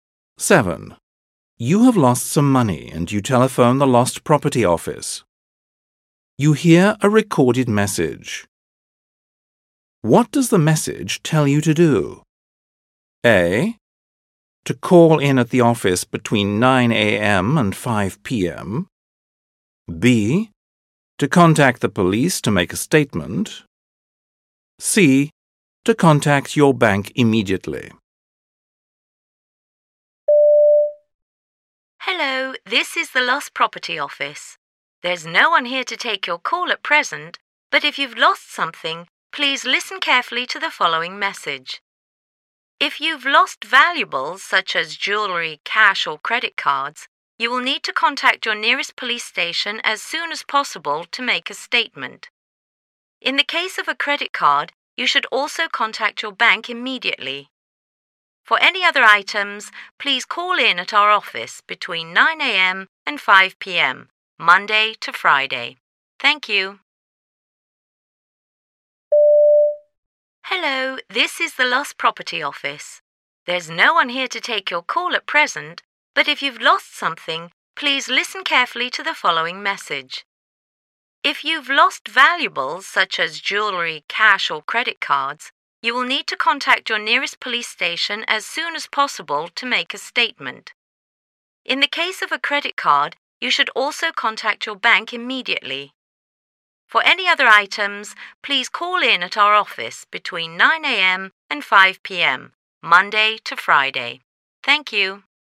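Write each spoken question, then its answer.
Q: What does the message tell you to do?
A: B: To contact the police to make a statement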